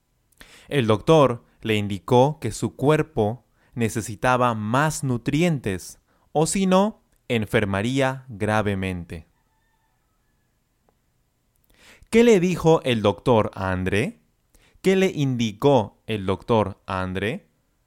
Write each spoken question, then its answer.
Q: ¿Qué le dijo el doctor a André?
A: le indicó que su cuerpo necesitaba más nutrientes, es decir, necesitaba consumir más nutrientes, o si no, enfermaría gravemente.